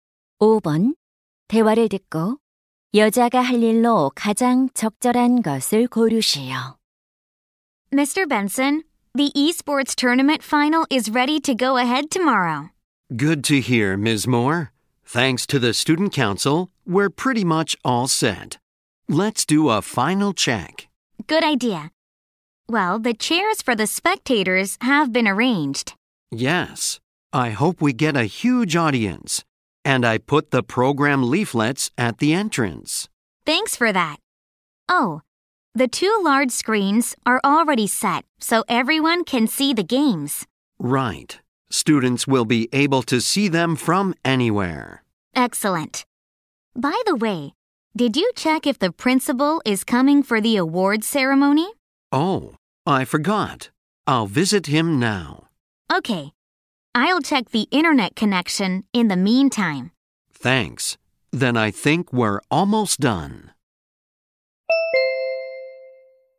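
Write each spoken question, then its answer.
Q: 대화를 듣고 여자가 할 일로 가장 적절한 것을 고르시오.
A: 인터넷 연결 상태 확인하기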